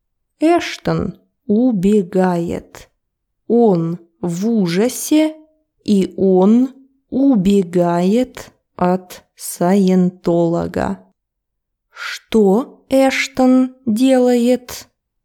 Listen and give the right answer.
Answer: Он убегает от саентолога.